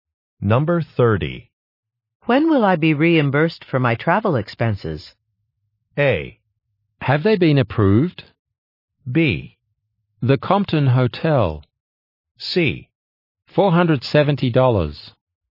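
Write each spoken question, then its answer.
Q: When will I be reimbursed for my travel expenses?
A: A: Have they been approved?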